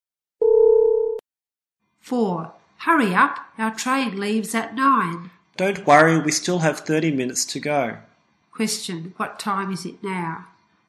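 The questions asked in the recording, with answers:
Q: What time is it now?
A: 8:30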